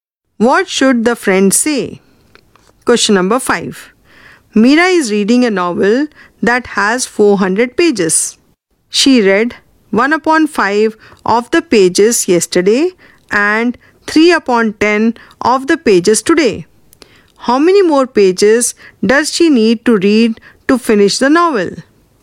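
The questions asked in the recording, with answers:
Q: How many more pages does she need to read to finish the novel?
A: 200 pages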